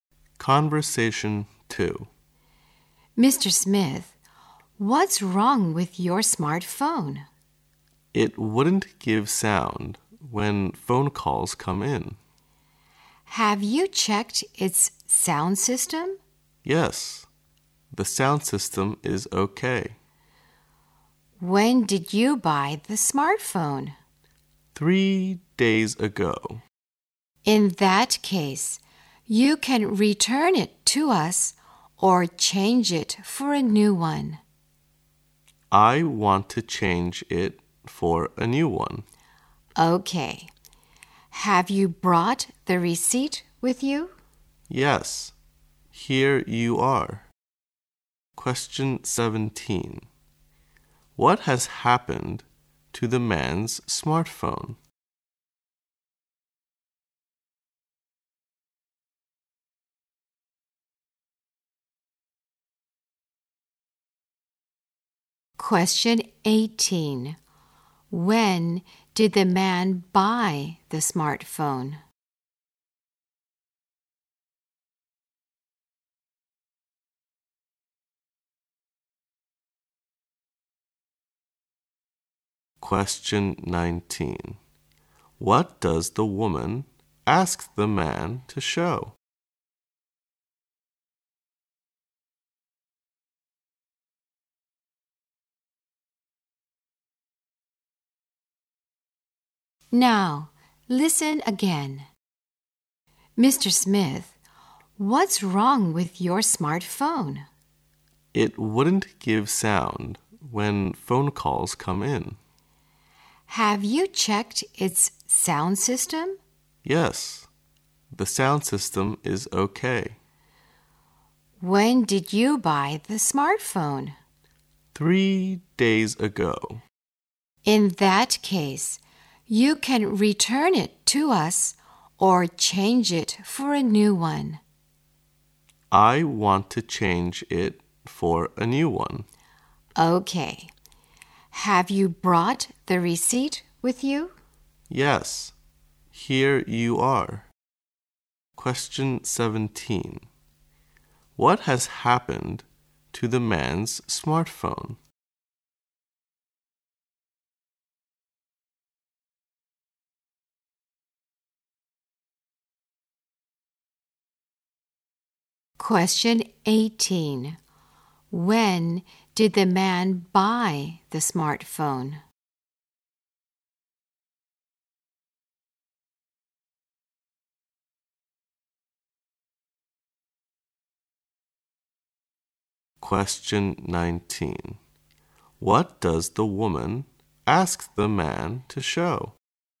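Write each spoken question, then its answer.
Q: What has happened to the man's smartphone?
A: It gives no sound when calls come in

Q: When did the man buy the smartphone?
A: 3 days ago

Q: What does the woman ask the man to show?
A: The receipt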